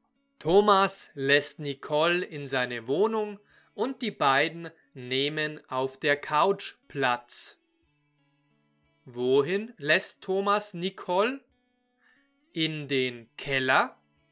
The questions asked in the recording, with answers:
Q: Wohin lässt Thomas Nicole?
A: Er lässt sie in die Wohnung.